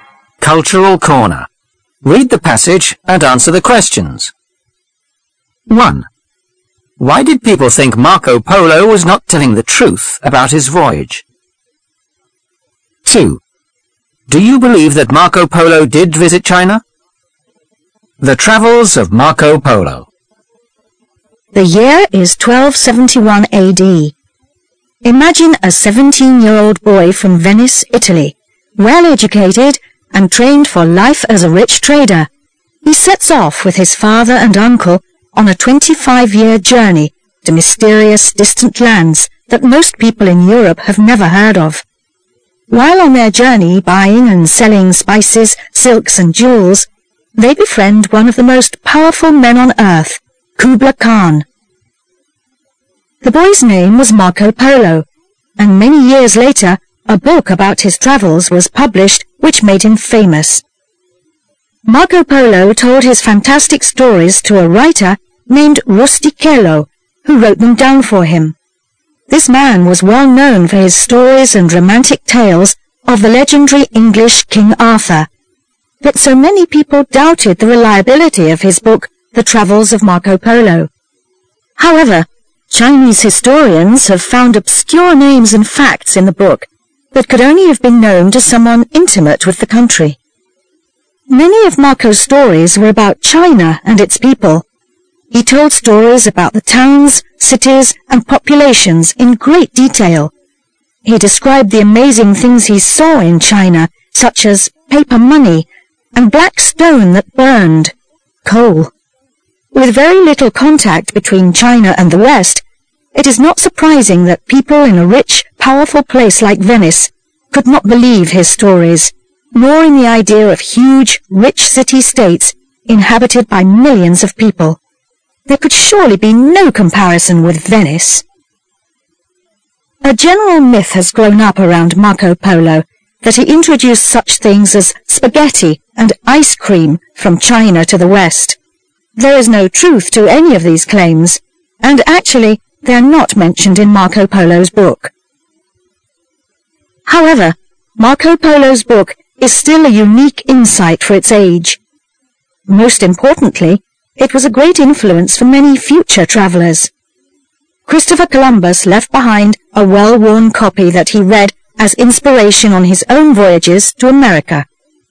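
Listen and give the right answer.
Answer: Because there was little contact between China and the West, and people in rich, powerful Venice could not believe his stories of huge, rich cities with millions of people.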